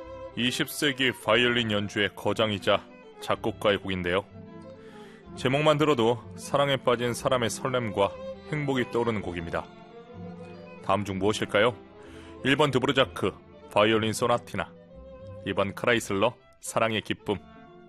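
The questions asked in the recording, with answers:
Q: 다음 중 무엇일까요? 1번 드브르자크, 바이올린 소나티나, 2번 크라이슬러, 사랑의 기쁨.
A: 2: 크라이슬러, 사랑의 기쁨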